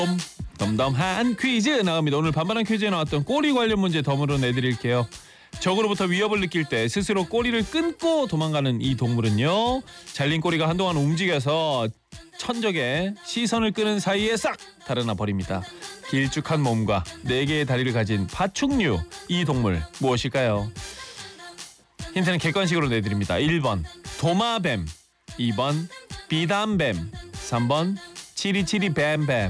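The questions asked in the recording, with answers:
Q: 길쭉한 몸과 네 개의 다리를 가진 파충류, 이 동물 무엇일까요?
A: 1: 도마뱀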